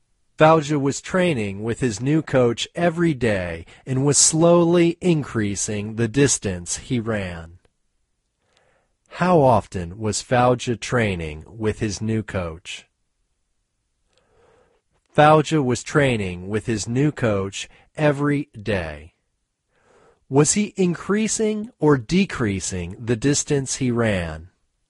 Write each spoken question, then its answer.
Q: How often was Fauja training with his new coach?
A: Fauja was training with his new coach every day.

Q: Was he increasing or decreasing the distance he ran?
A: He was increasing the distance he ran.